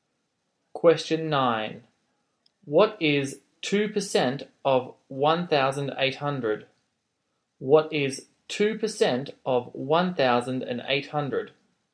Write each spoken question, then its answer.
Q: What is 2% of 1,800?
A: your answer is 36.